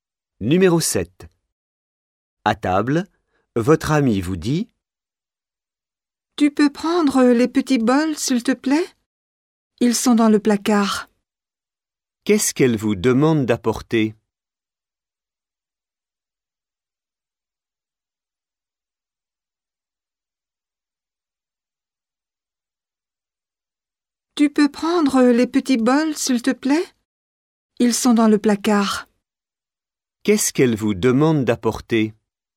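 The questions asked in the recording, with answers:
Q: Qu'est-ce qu'elle vous demande d'apporter?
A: Les petits bols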